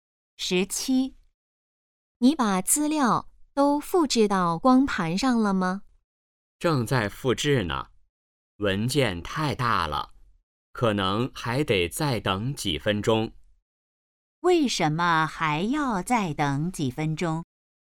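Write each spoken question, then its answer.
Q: 为什么还要再等几分钟?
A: 文件太大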